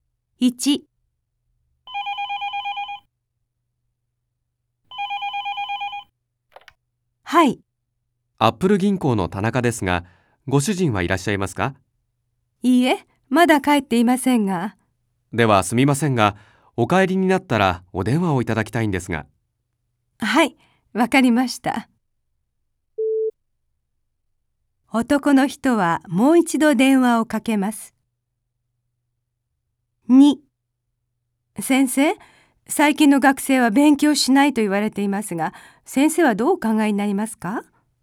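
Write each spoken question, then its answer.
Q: 男の人はもう一度電話をかけます。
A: いいえ(男の人ではなく、ご主人が電話をかけます)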